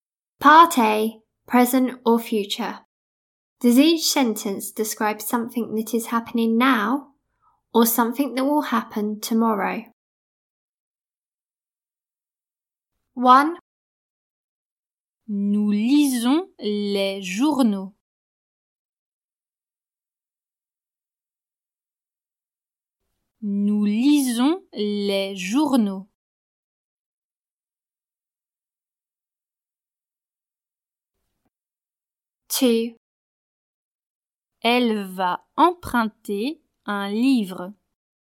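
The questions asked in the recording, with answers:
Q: Does each sentence describe something that is happening now or something that will happen tomorrow?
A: Happening now

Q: Does each sentence describe something that is happening now or something that will happen tomorrow?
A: Will happen tomorrow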